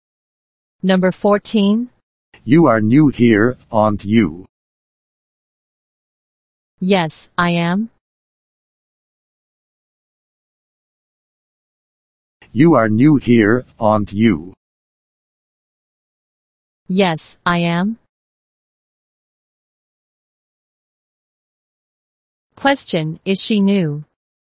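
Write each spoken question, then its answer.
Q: is she new?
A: Yes, she is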